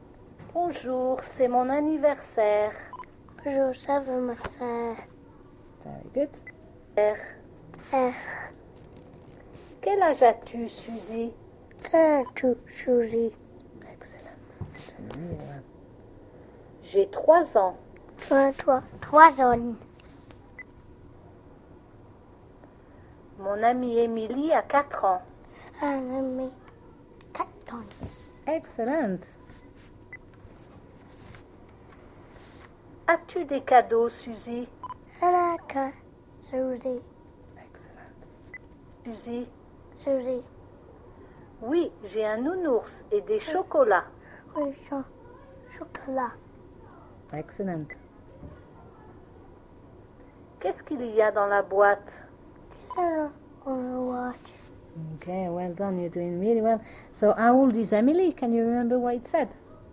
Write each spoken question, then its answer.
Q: So, how old is Emily?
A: mon amie Emilie a 4 ans.